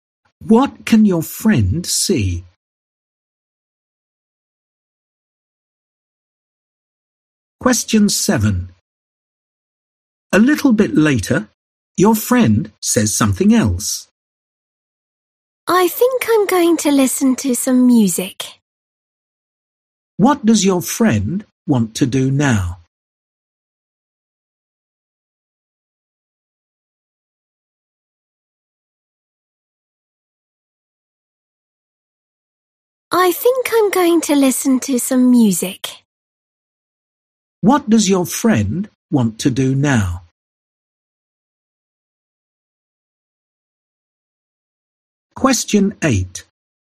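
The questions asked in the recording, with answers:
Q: What does your friend want to do now?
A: Listen to some music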